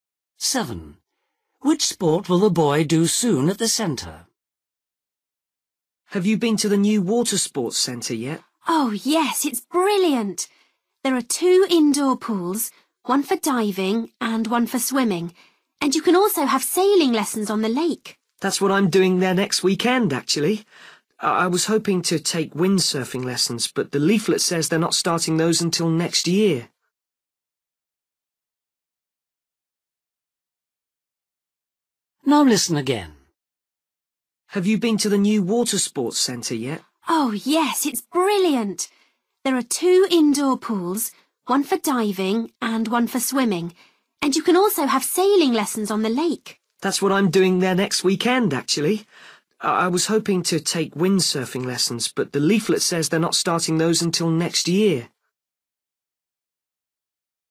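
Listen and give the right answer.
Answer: Sailing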